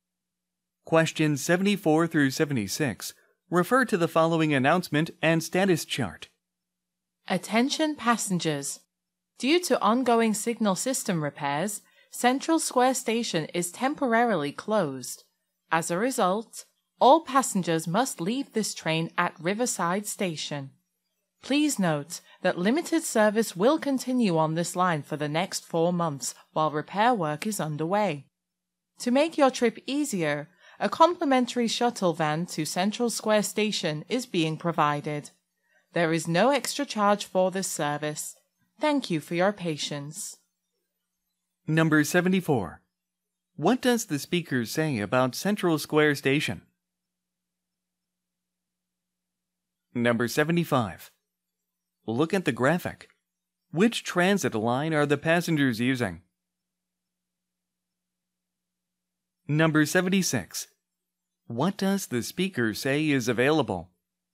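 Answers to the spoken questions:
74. It is temporarily closed due to signal system repairs.
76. A free shuttle van to Central Square Station.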